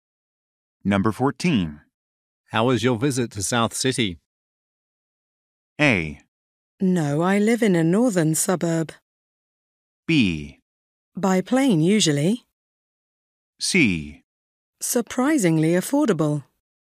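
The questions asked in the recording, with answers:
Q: How was your visit to South City?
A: C: Surprisingly affordable.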